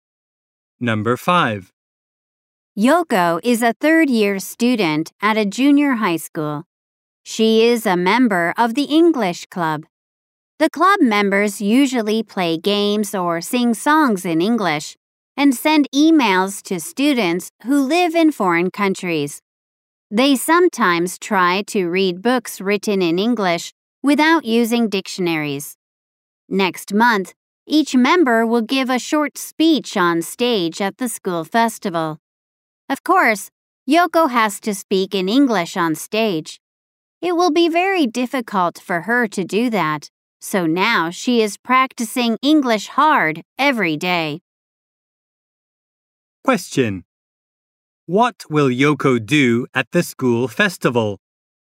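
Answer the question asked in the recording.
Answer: Give a short speech in English on stage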